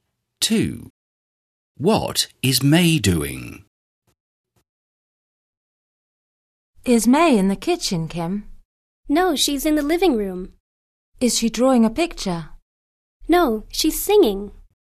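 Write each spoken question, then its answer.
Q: What is May doing?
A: Singing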